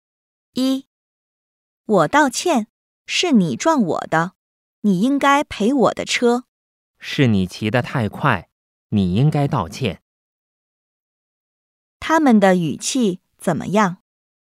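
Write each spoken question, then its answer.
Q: 他们的语气怎么样?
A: 很生气,在吵架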